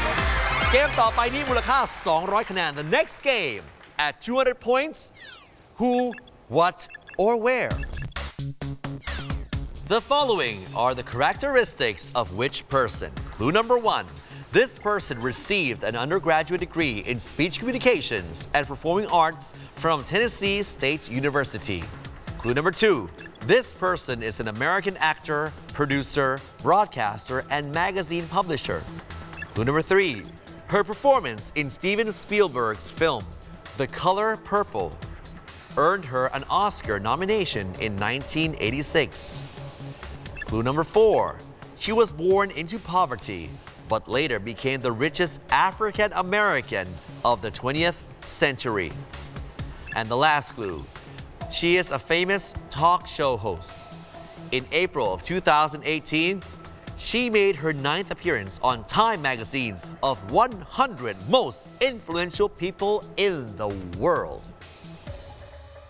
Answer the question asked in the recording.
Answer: The answer we're looking for is Oprah Winfrey